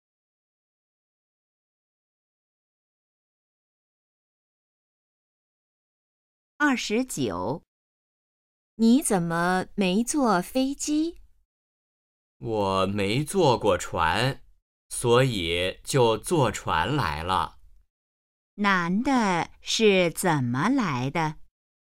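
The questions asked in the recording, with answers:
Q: 男的是怎么来的?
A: 坐船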